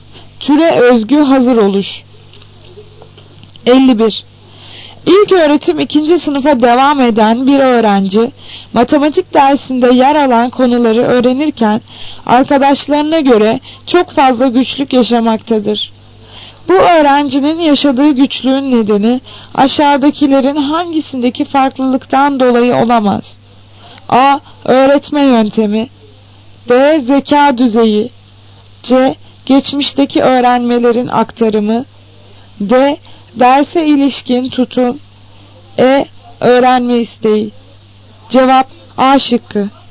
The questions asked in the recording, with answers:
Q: Bu öğrencinin yaşadığı güçlüğün nedeni aşağıdakilerin hangisindeki farklılıktan dolayı olamaz?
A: Cevap A şıkkı. Öğretme yöntemi.